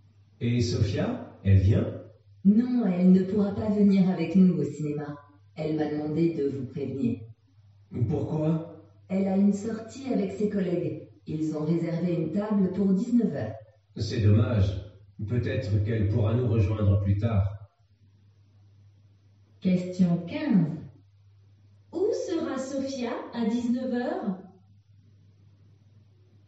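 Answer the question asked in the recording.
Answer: Au restaurant, avec ses collègues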